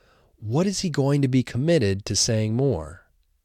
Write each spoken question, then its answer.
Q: What is he going to be committed to saying more?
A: He is going to become committed to saying no more.